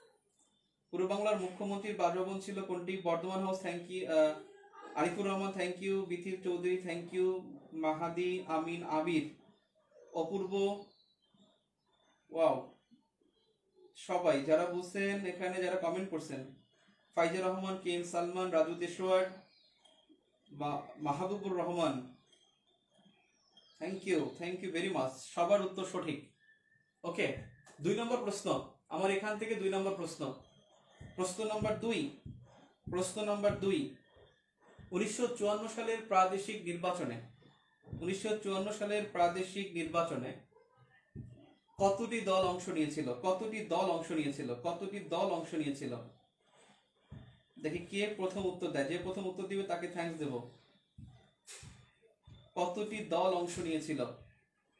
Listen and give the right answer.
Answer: নির্বাচনে অংশ নিয়েছে 16টি দল